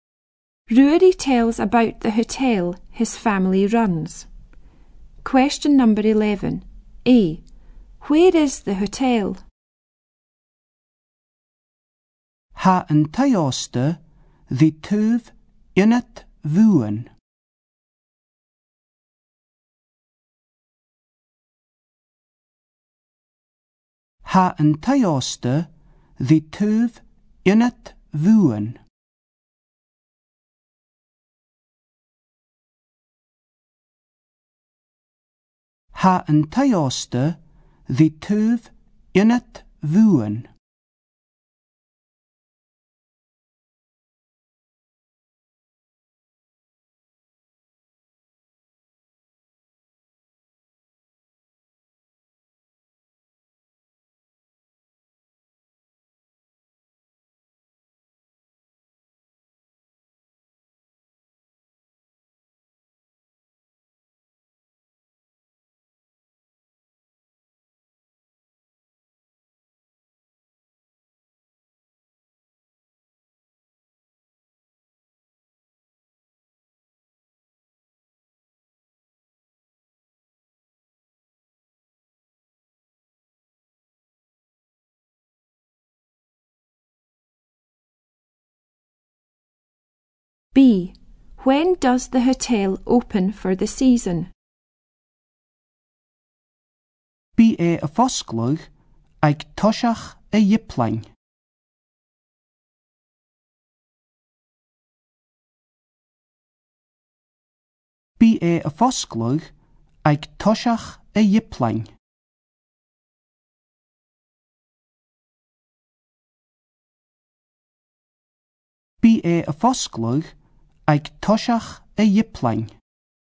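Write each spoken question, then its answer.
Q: When does the hotel open for the season?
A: At the beginning of April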